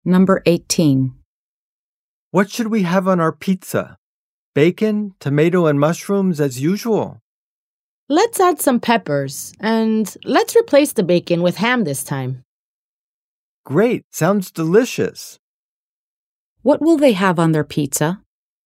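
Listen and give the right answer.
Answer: Ham, tomato, mushrooms and peppers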